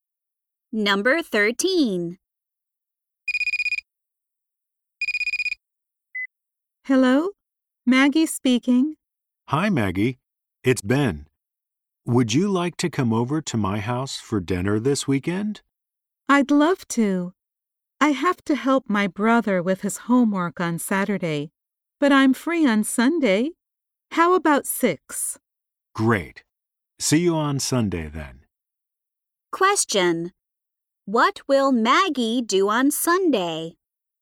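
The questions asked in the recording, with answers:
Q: What will Maggie do on Sunday?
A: Have dinner at Ben's house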